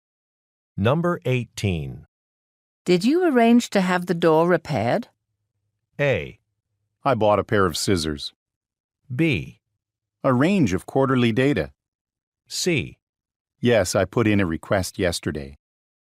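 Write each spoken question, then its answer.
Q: Did you arrange to have the door repaired?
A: C: Yes, I put in a request yesterday.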